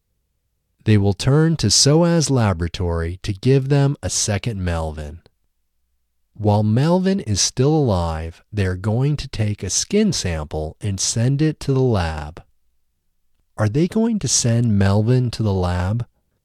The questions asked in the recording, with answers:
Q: Are they going to send Melvin to the lab?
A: No, they aren't going to send Melvin to the lab.